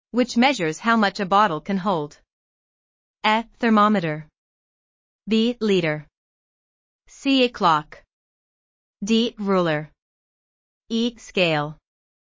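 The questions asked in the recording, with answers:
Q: which measures how much a bottle can hold.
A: B: Liter.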